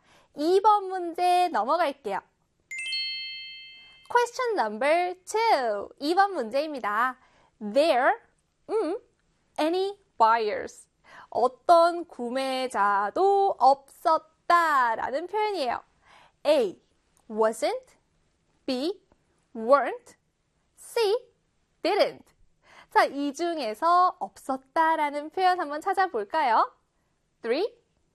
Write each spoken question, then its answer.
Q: 자, 이 중에서 없었다 라는 표현 한번 찾아볼까요?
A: 정답은요, 바로 B의 weren't 였습니다.